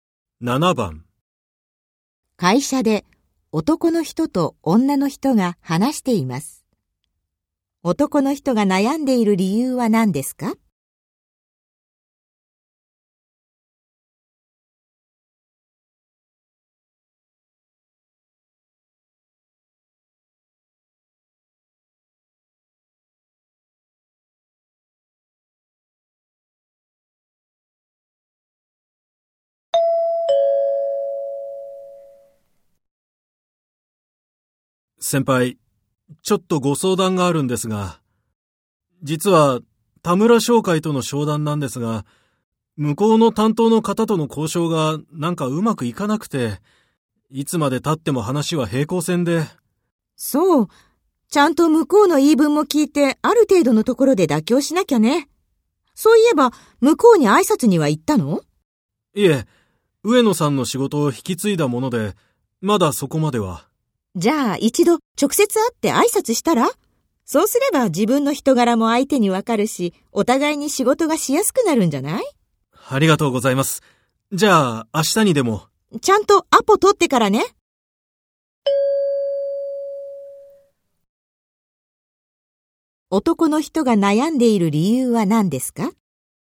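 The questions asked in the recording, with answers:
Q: 男の人が悩んでいる理由は何ですか?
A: 取引先(田村商会)の担当者との交渉がうまくいかないから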